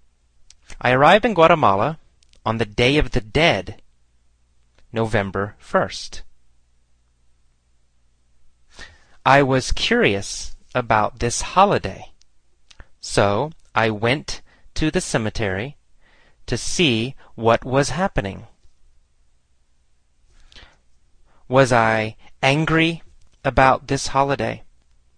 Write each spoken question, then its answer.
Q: Was I angry about this holiday?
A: No, I wasn't angry about this holiday.